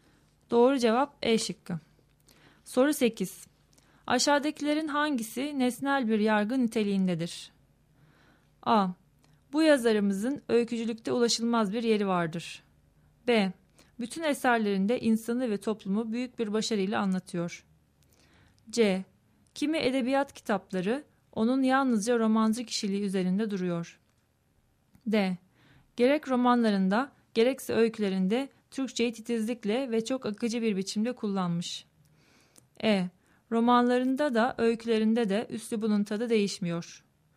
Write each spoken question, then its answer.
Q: Aşağıdakilerin hangisi nesnel bir yargı niteliğindedir?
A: Doğru cevap C şıkkı.